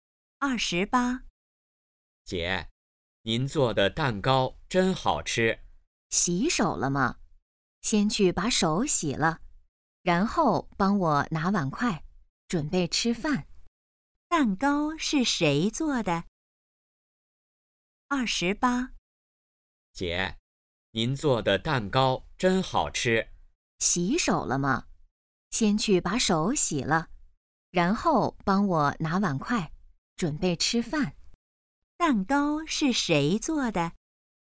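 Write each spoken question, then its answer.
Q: 蛋糕是谁做的?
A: 姐姐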